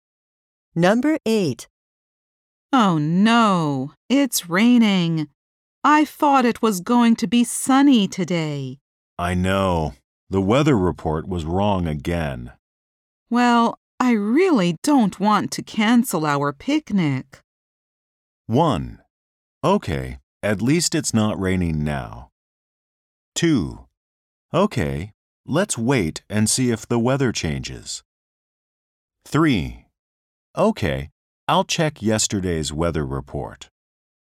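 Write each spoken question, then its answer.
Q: Well, I really don't want to cancel our picnic.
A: 2: Okay, let's wait and see if the weather changes.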